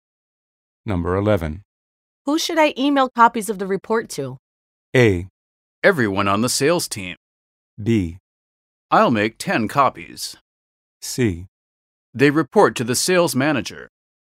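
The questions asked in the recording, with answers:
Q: Who should I email copies of the report to?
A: A: Everyone on the sales team.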